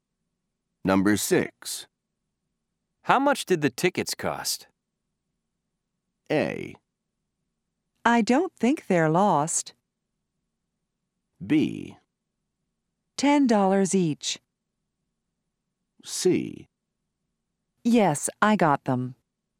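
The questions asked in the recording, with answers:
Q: How much did the tickets cost?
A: B: $10 each.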